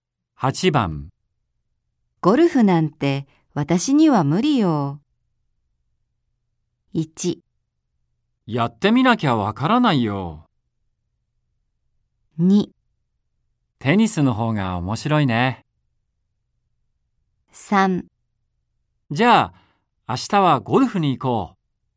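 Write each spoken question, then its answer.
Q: ゴルフなんて私には無理よ。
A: 1: やってみなきゃわからないよ。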